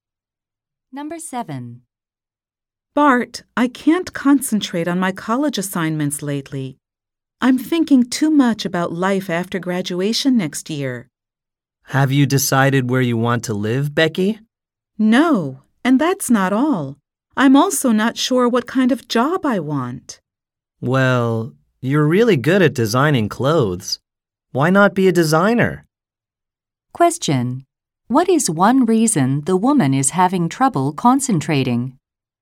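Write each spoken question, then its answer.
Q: What is one reason the woman is having trouble concentrating?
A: She is unsure what job she wants after graduation.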